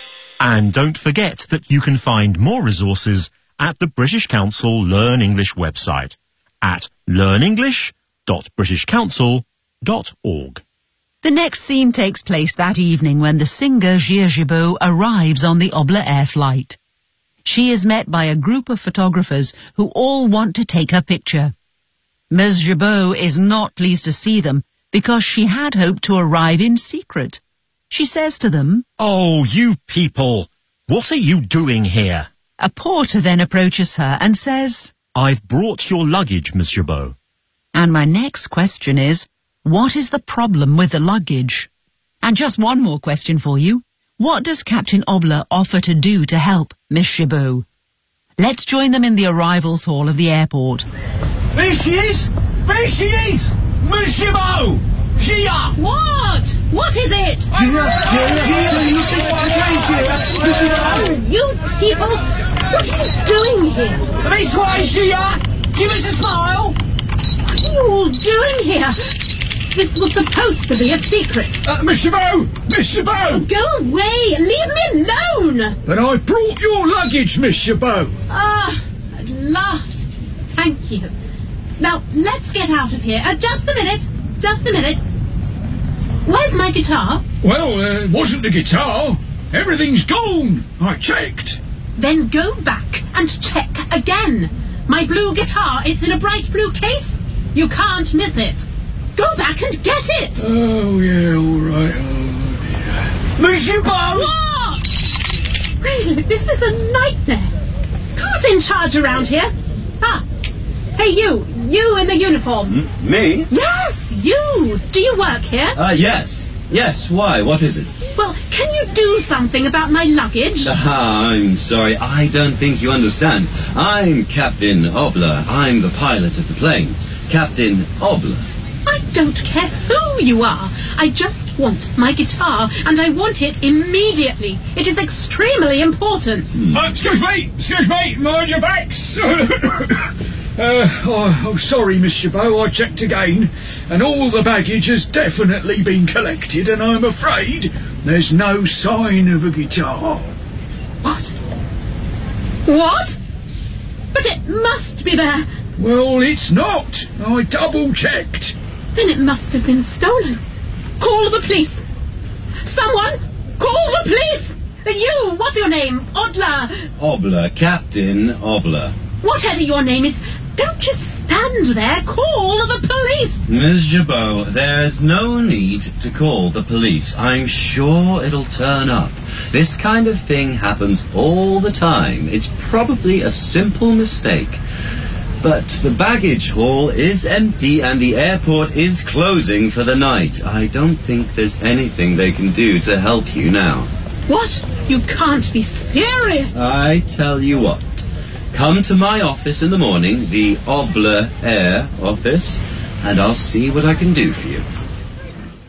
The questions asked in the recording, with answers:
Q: what is the problem with the luggage?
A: Her guitar, her blue guitar, has gone missing.

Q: What does Captain Obler offer to do to help Miss Jabot?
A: "Come to my office in the morning, and I'll see what I can do for you."